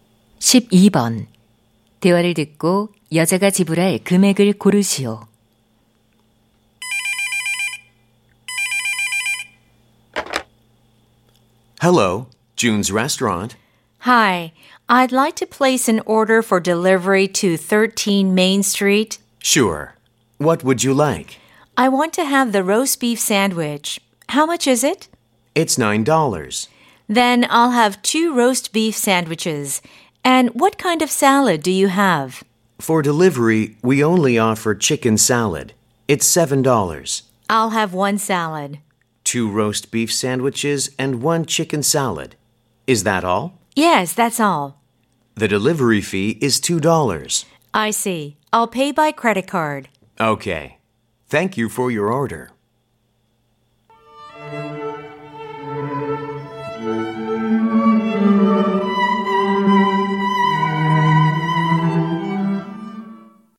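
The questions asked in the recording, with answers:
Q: 대화를 듣고 여자가 지불할 금액을 고르시오.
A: 27달러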